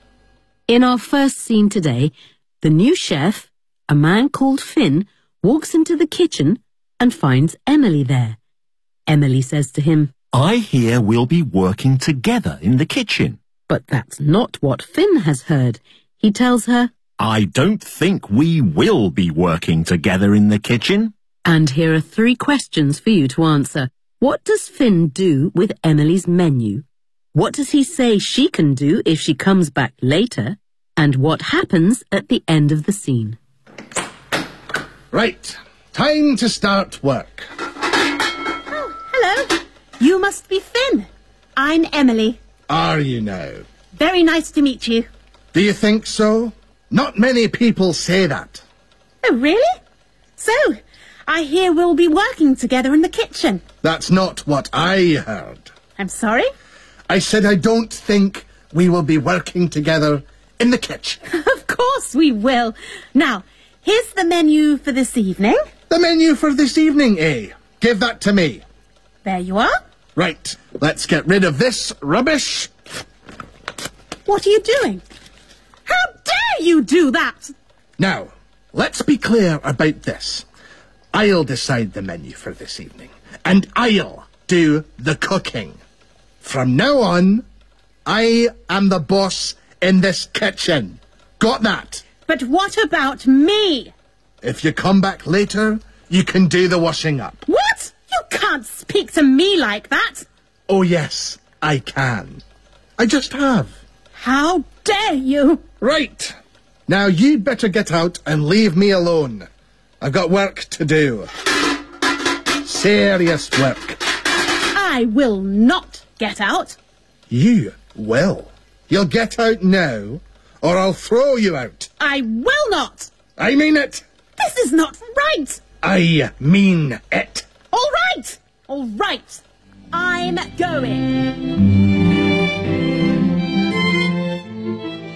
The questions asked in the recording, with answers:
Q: What does he say she can do if she comes back later?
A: If you come back later, you can do the washing up.

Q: And what happens at the end of the scene?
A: Finn is obviously serious, and so very reluctantly, Emily goes away.